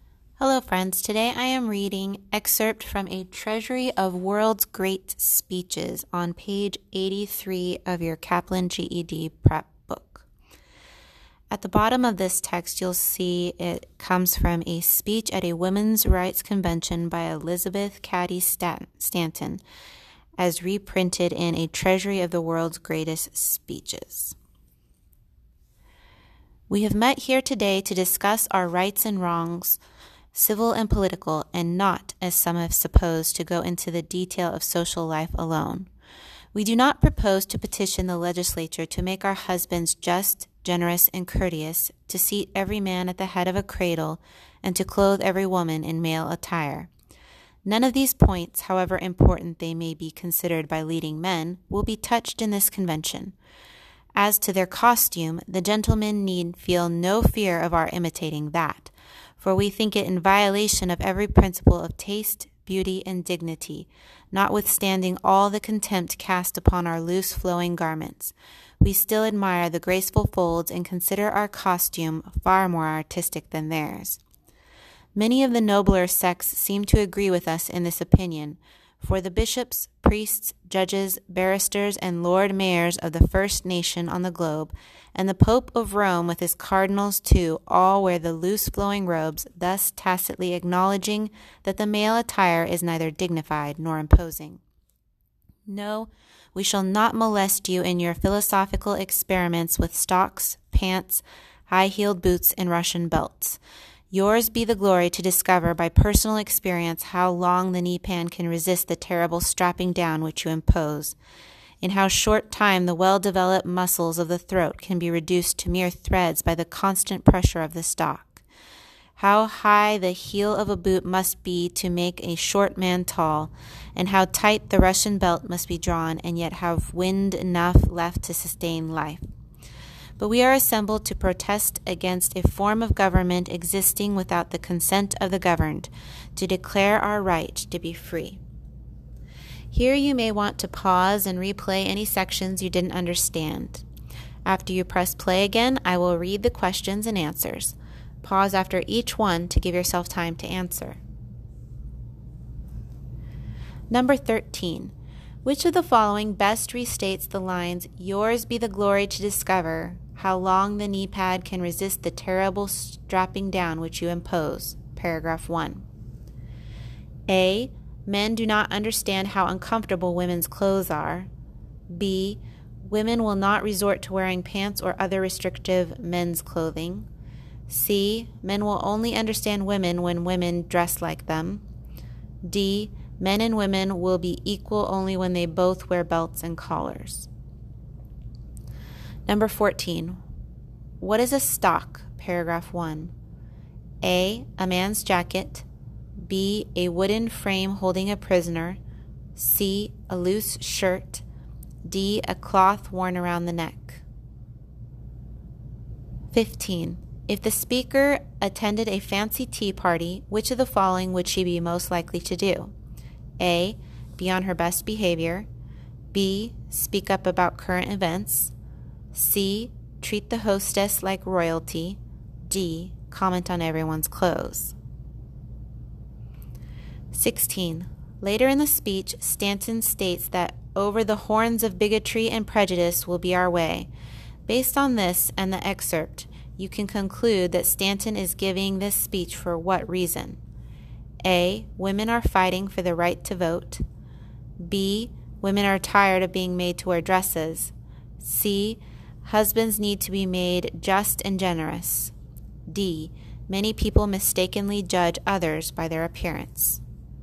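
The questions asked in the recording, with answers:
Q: What is a stock?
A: D: A cloth worn around the neck.

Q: Based on this and the excerpt, you can conclude that Stanton is giving this speech for what reason?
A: A: Women are fighting for the right to vote.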